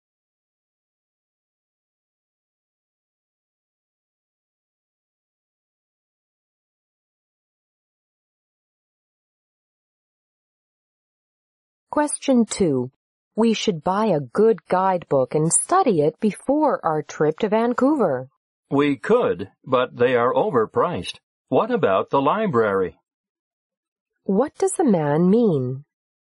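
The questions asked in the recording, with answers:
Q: What does the man mean?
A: They could borrow a guidebook from the library instead of buying one.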